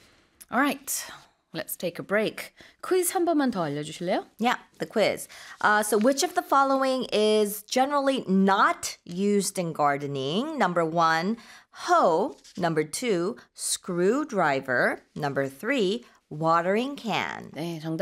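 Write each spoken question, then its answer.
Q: So which of the following is generally not used in gardening?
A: 2: screwdriver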